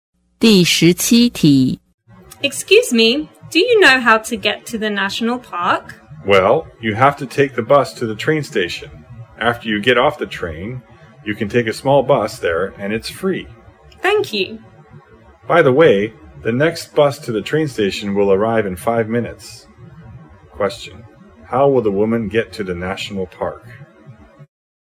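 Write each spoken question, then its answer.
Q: how will the woman get to the national park?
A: By bus to the train station, then by train, then by a free small bus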